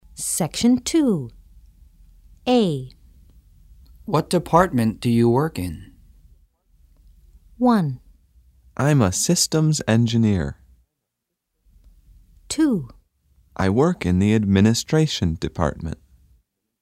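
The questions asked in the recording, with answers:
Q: What department do you work in?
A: 2: I work in the administration department.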